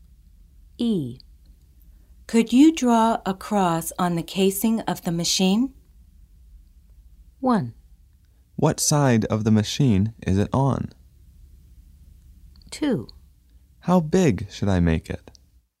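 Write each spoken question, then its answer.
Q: Could you draw a cross on the casing of the machine?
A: 2: How big should I make it?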